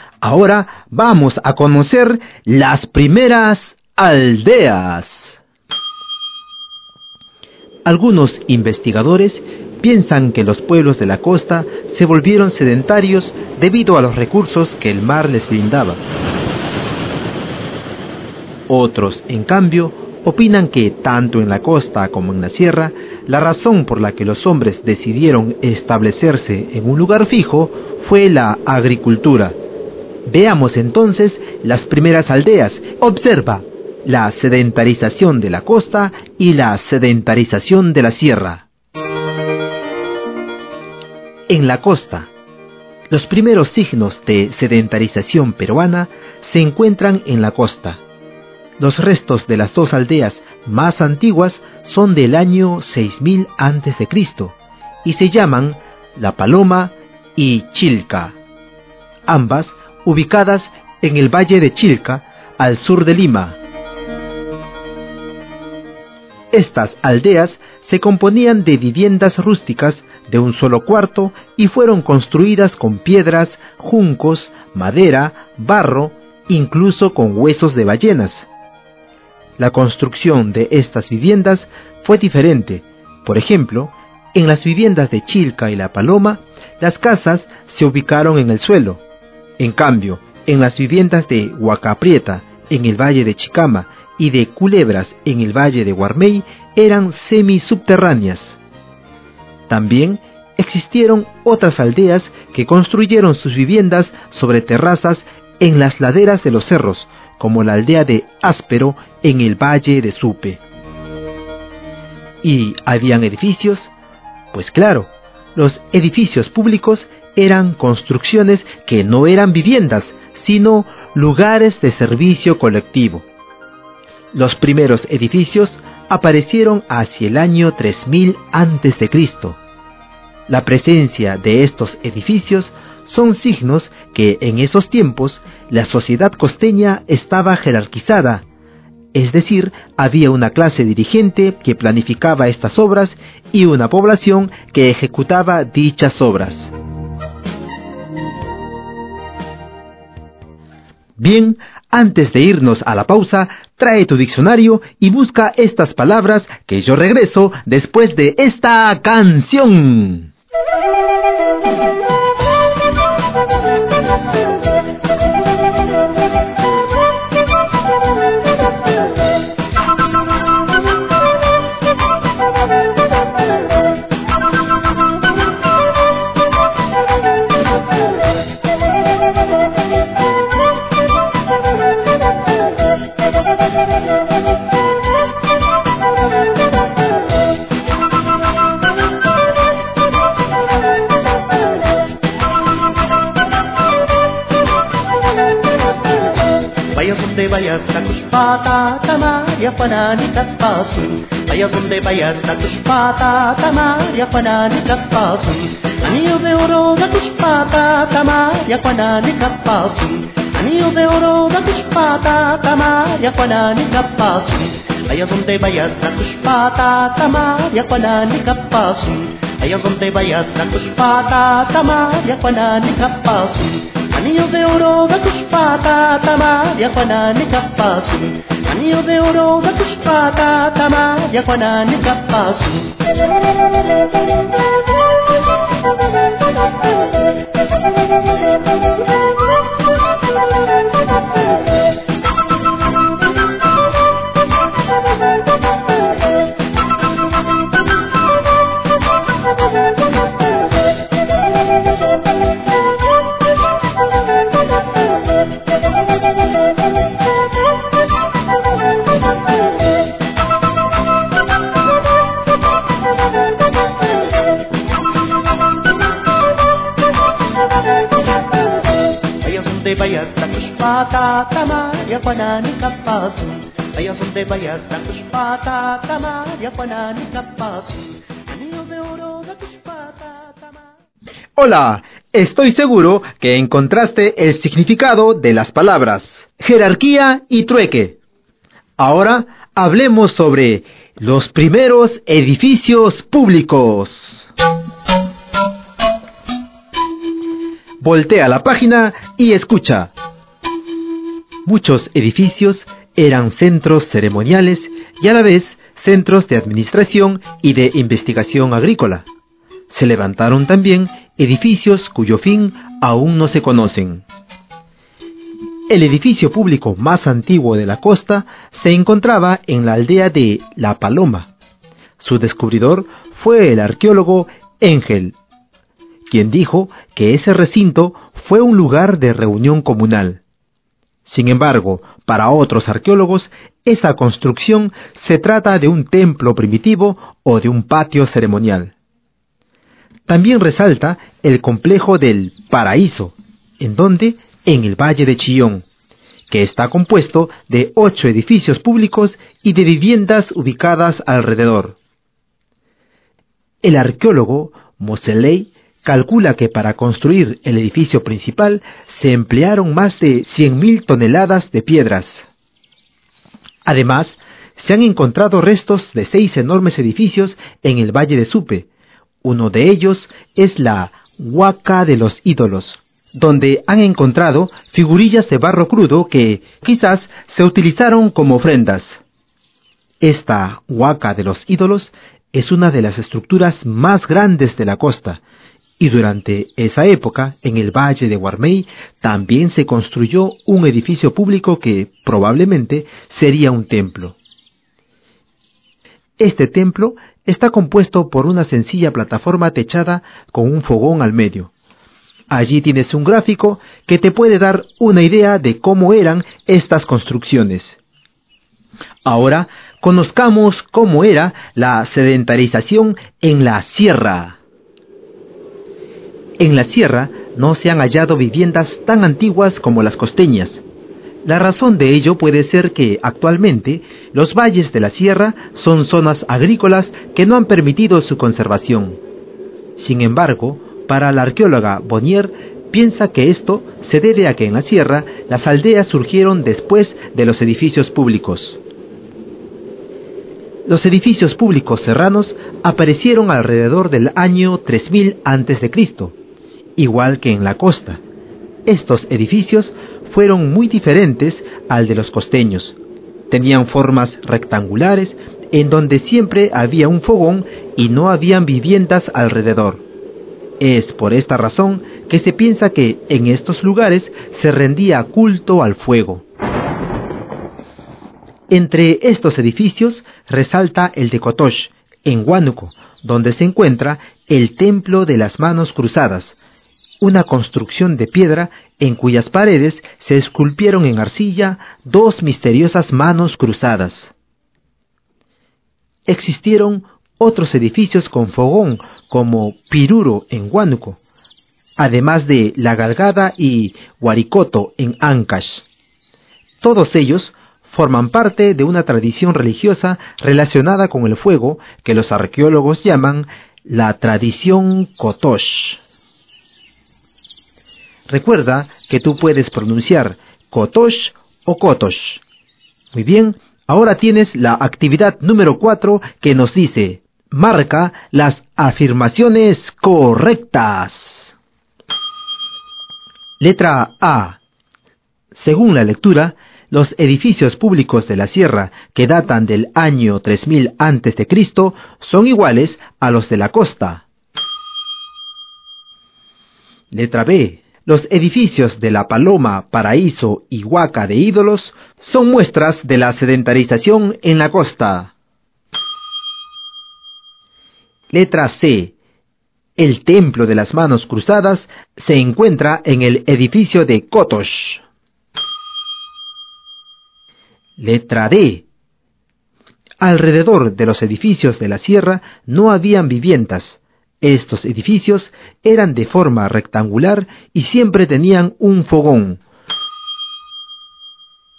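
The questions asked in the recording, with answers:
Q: Letra A. Según la lectura, los edificios públicos de la sierra que datan del año 3000 a.C.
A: Incorrecta: eran muy diferentes a los de la costa

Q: Letra B. Los edificios de La Paloma, Paraíso y Huaca de Ídolos son muestras de la sedentarización en la costa.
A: Correcta

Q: Letra C. El Templo de las Manos Cruzadas se encuentra en el edificio de Cotosh.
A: Correcta

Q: Letra D. Alrededor de los edificios de la sierra no habían viviendas.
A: Correcta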